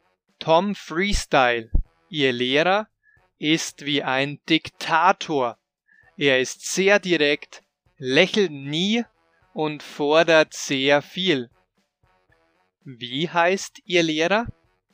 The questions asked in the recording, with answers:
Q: Wie heißt Ihr Lehrer?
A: Tom Freestyle. Ihr Tanzlehrer heißt Tom Freestyle.